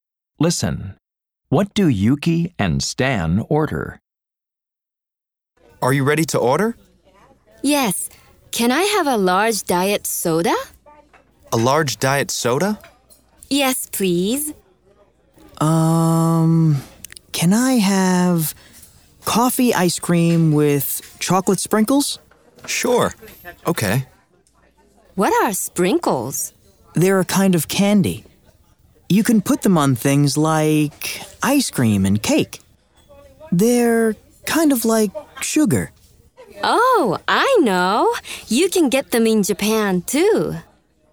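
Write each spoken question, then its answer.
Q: What do Yuki and Stan order?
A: A large diet soda and coffee ice cream with chocolate sprinkles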